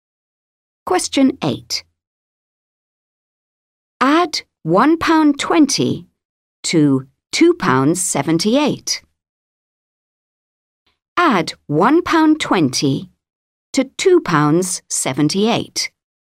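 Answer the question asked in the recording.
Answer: £3.98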